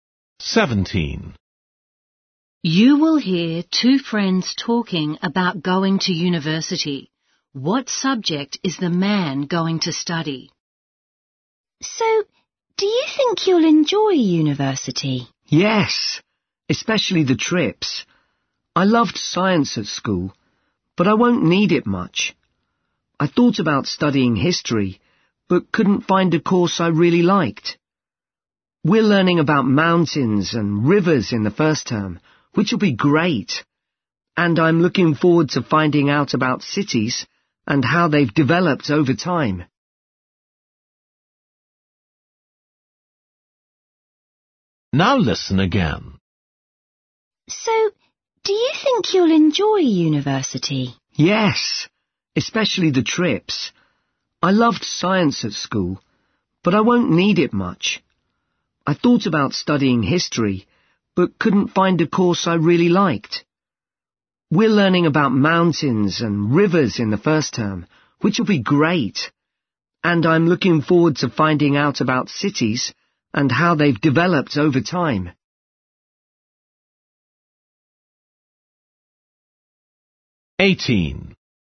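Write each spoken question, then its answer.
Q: What subject is the man going to study?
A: Geography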